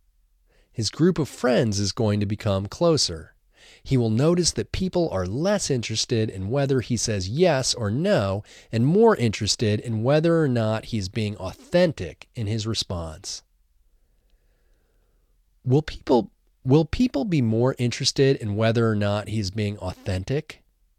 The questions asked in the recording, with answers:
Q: Will people be more interested in whether or not he is being authentic?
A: Yes, people will be more interested in whether or not he is being authentic.